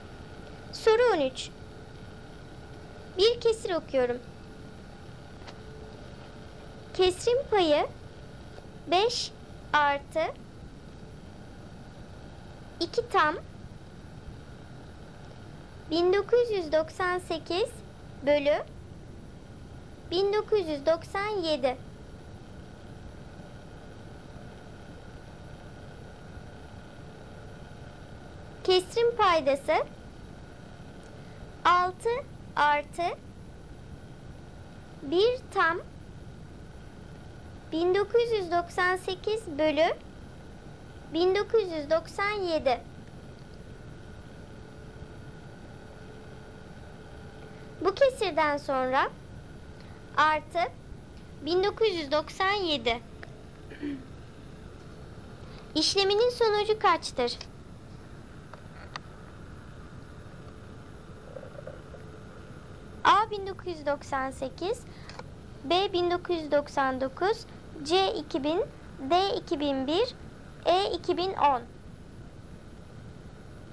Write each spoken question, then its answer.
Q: İşleminin sonucu kaçtır?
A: Doğru cevap A. 1998.